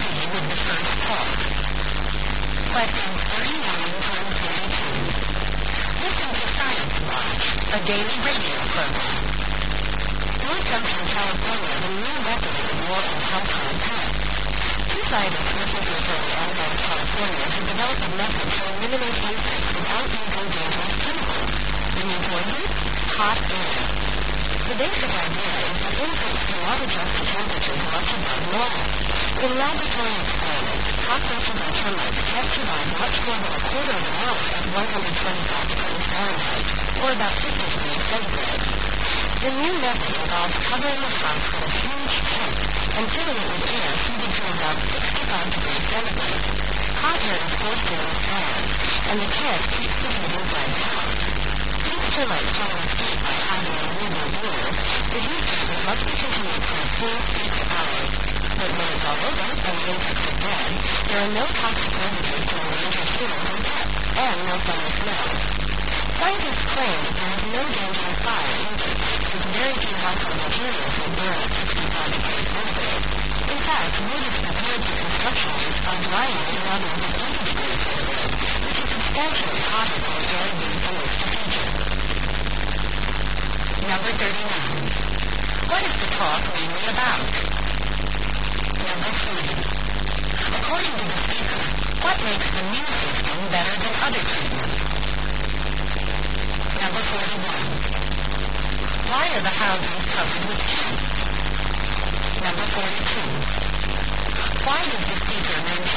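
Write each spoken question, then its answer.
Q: What is the talk mainly about?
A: A new method of killing insects with hot air

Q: According to the speaker, what makes the new system better than other treatments?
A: It leaves no toxic residues

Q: Why are the houses covered with tents?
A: To keep the heat inside the house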